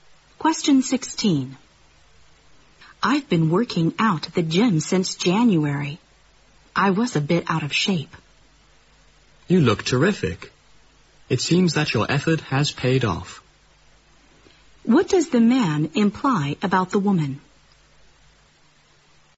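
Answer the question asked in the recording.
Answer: Her workouts at the gym have paid off; she looks in good shape now.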